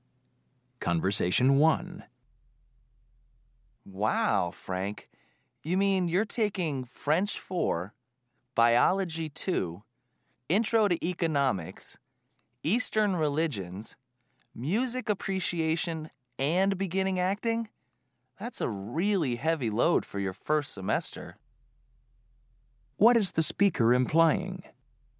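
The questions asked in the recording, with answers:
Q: What is the speaker implying?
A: Frank is taking too many courses for his first semester.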